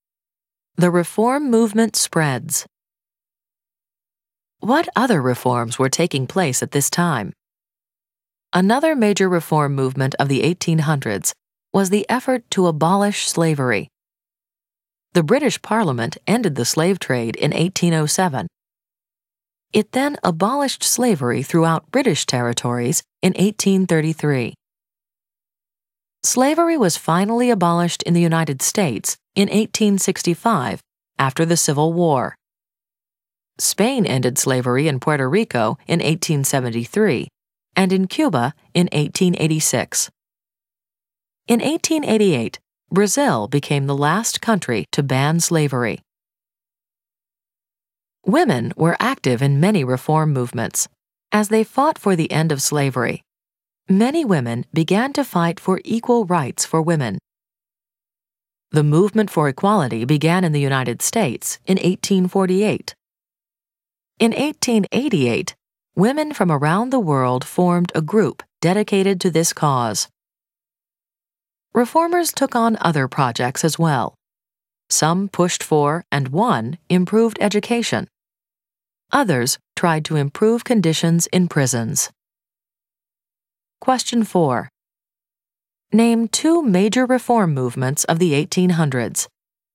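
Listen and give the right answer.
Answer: The abolition of slavery and women's rights (also improved education and prison reform).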